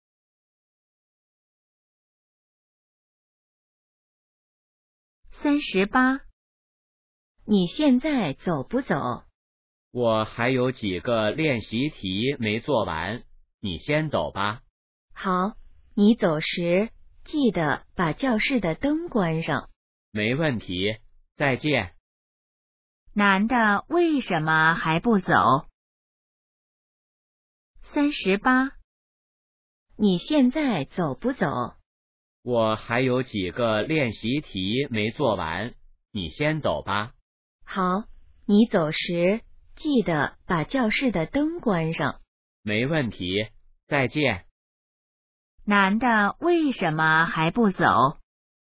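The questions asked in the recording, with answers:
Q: 男的为什么还不走?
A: 练习题还没做完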